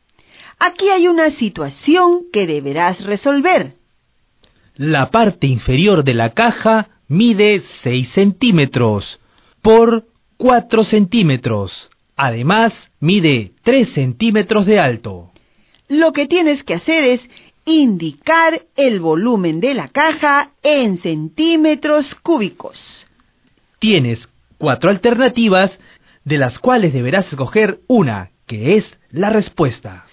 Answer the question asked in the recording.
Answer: 72 centímetros cúbicos.